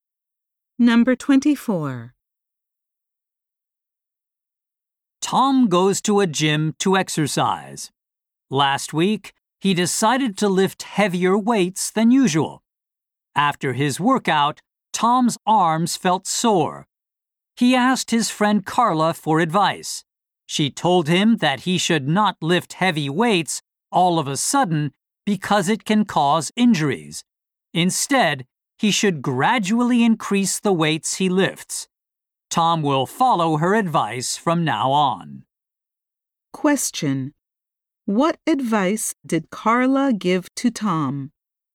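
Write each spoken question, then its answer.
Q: What advice did Carla give to Tom?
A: Increase the weights gradually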